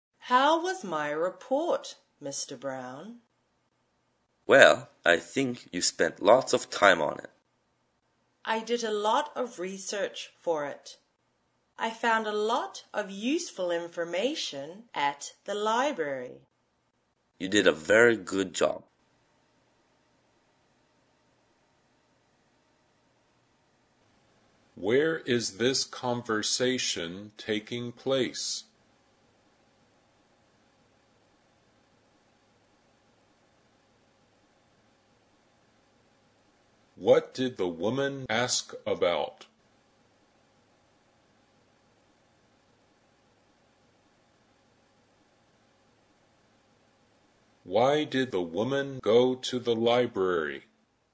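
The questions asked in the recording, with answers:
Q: What did the woman ask about?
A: Her report

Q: Why did the woman go to the library?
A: To do research for her report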